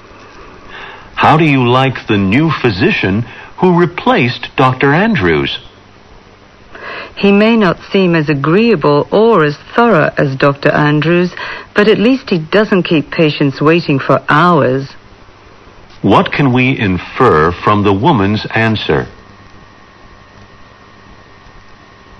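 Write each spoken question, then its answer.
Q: What can we infer from the woman's answer?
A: She likes that the new doctor doesn't keep patients waiting, though he seems less agreeable and thorough than Dr. Andrews.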